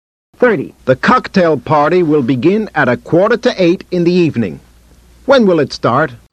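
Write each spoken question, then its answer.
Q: When will it start?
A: At 7:45 p.m.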